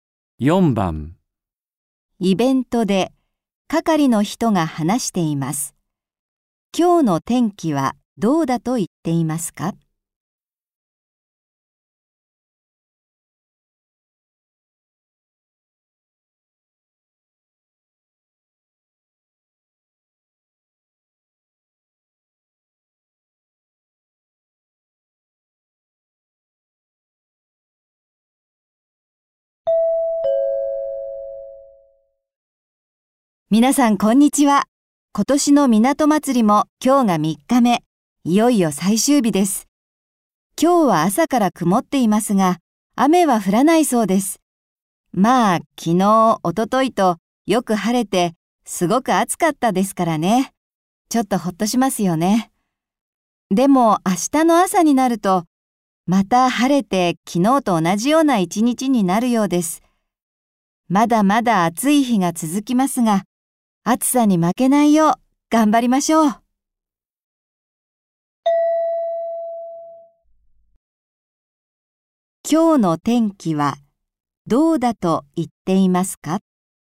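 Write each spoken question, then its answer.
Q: 今日の天気はどうだと言っていますか?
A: 曇っているが、雨は降らない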